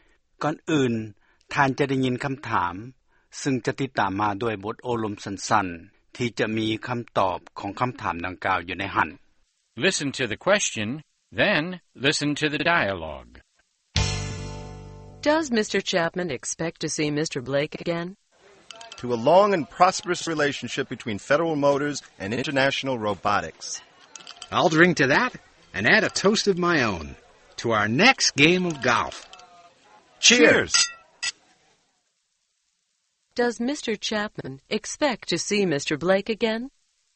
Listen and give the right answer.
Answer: Yes, he does. He makes a toast to the next time they play golf together.